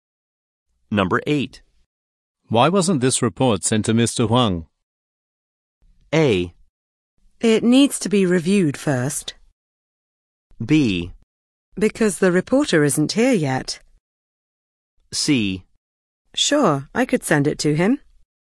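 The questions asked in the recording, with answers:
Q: Why wasn't this report sent to Mr. Huang?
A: A: It needs to be reviewed first.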